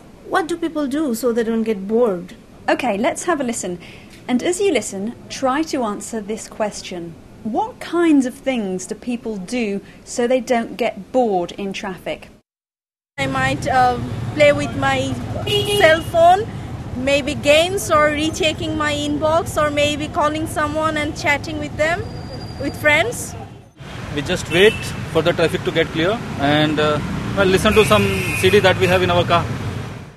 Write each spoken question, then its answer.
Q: What kinds of things do people do so they don't get bored in traffic?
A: Well, the girl says she plays with her cell phone.